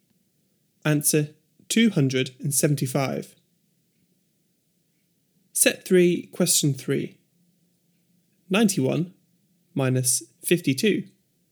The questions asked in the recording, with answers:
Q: 91 minus 52.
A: 39.